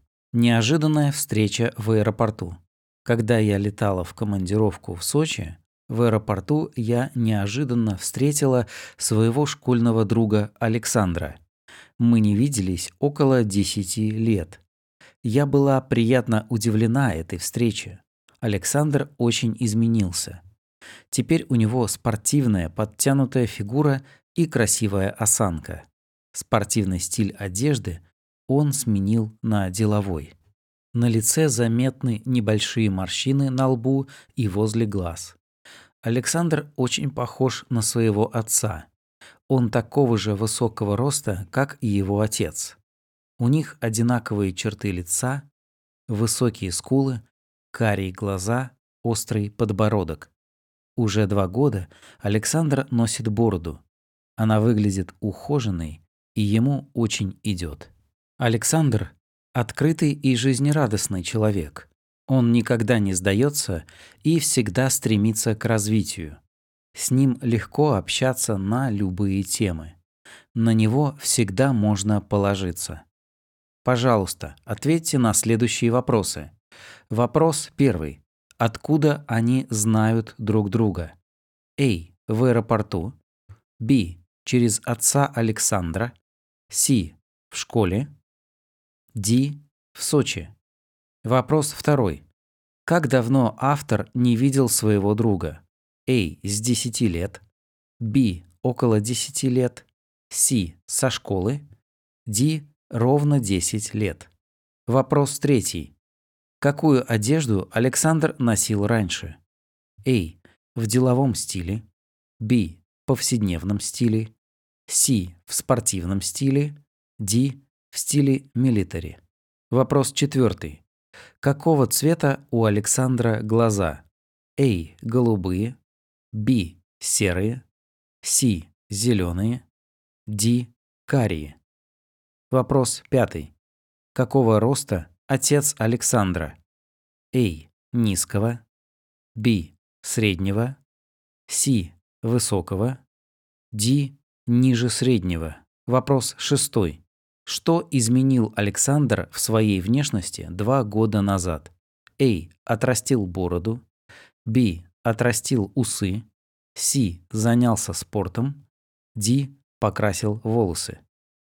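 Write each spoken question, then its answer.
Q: Откуда они знают друг друга?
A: C: В школе.

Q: Как давно автор не видел своего друга?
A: B: Около 10 лет.

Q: Какую одежду Александр носил раньше?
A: C: В спортивном стиле.

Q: Какого цвета у Александра глаза?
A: D: Карие.

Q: Какого роста отец Александра?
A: C: Высокого.

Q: Что изменил Александр в своей внешности 2 года назад?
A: A: Отрастил бороду.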